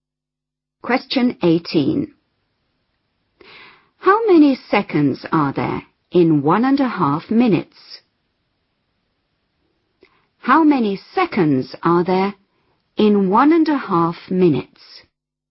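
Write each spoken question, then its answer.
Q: How many seconds are there in 1.5 minutes?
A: 90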